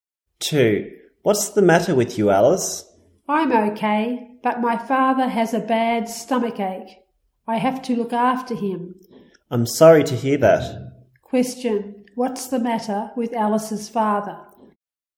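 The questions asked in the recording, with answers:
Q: What's the matter with Alice's father?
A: He has a bad stomach ache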